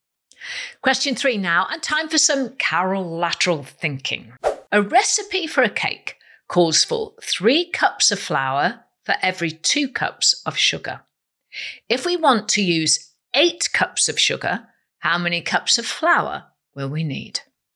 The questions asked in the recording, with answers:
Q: If we want to use eight cups of sugar, how many cups of flour will we need?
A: And the answer is 12 cups of flour.